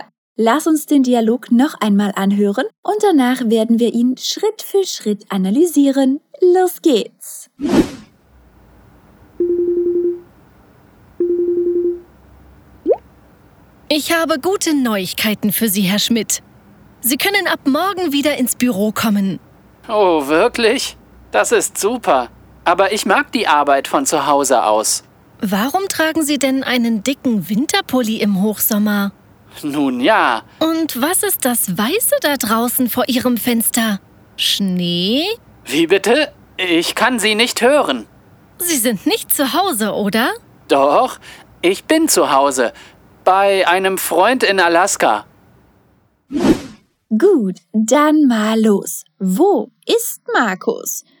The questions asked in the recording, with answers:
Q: Wo ist Markus?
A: Zu Hause? Nun ja, nicht ganz. Er ist bei einem Freund zu Hause.